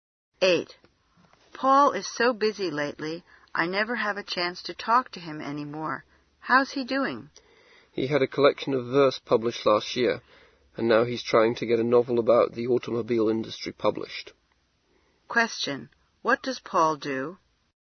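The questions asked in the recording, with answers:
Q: What does Paul do?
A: He is a writer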